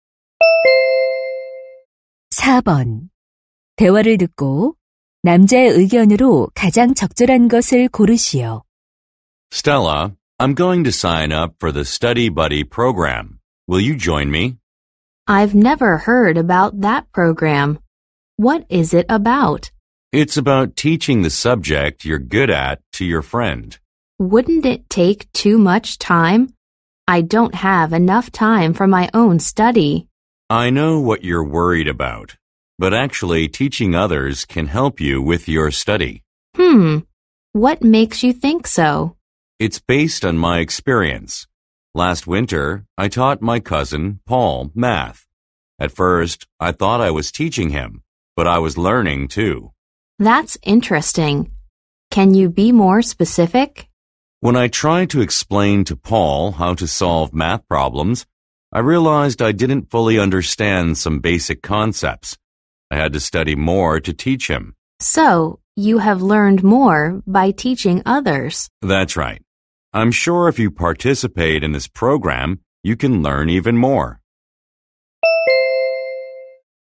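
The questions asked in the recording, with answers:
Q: 대화를 듣고 남자의 의견으로 가장 적절한 것을 고르시오.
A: 다른 사람을 가르치는 것이 자신의 공부에 도움이 된다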